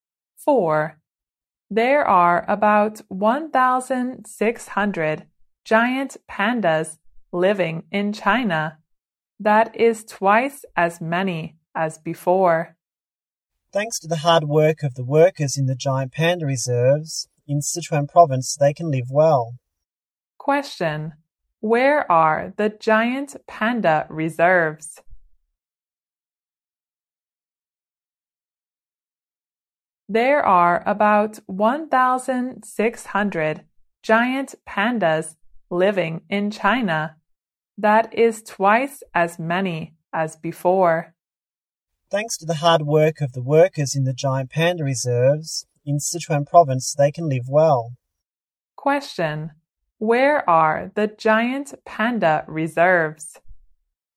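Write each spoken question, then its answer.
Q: Where are the giant panda reserves?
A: In Sichuan province.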